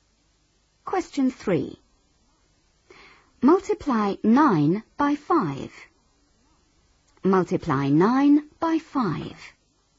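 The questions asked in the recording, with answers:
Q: Multiply 9 by 5.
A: 45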